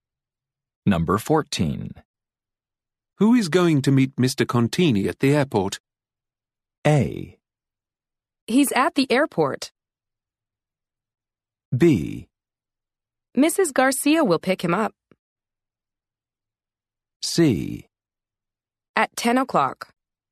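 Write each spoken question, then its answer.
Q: Who is going to meet Mr. Contini at the airport?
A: B: Mrs. Garcia will pick him up.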